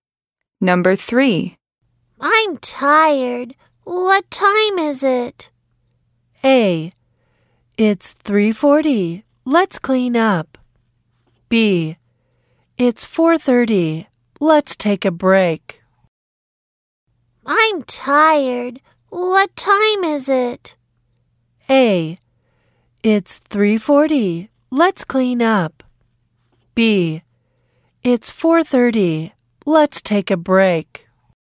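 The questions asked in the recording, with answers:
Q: I'm tired. What time is it?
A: B: It's 4:30. Let's take a break.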